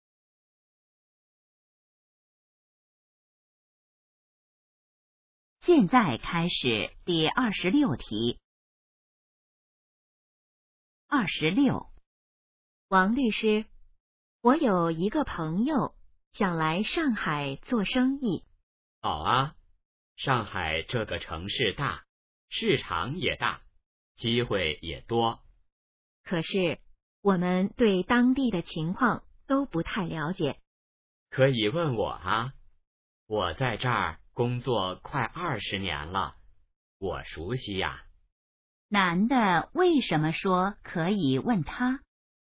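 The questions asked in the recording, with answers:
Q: 男的为什么说可以问他?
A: 他熟悉当地情况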